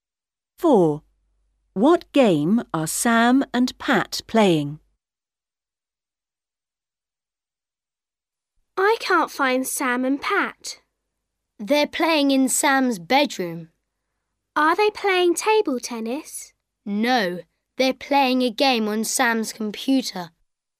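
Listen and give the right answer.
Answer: A computer game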